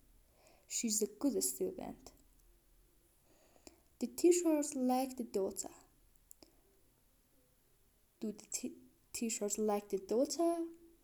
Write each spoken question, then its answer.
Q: Do the teachers like the daughter?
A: Yes, the teachers like her.